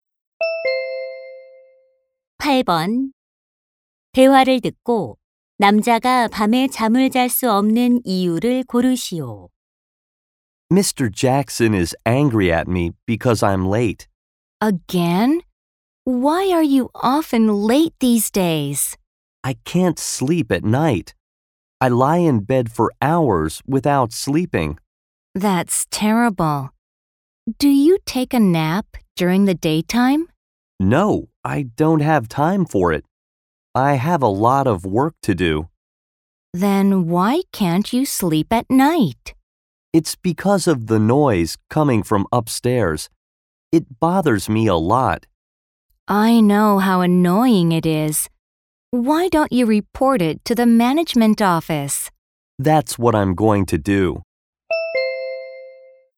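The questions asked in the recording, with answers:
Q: 대화를 듣고 남자가 밤에 잠을 잘 수 없는 이유를 고르시오.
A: 위층 소음 때문에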